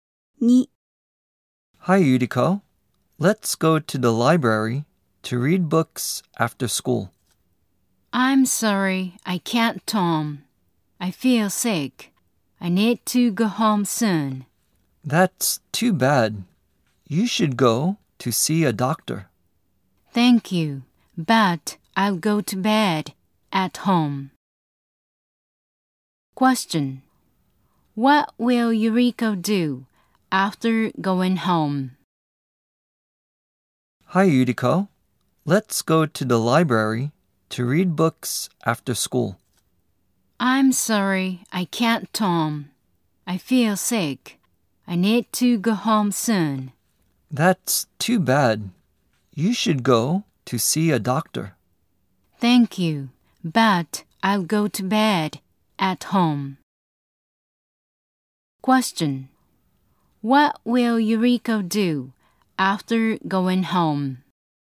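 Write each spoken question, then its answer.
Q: What will Yuriko do after going home?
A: She will go to bed.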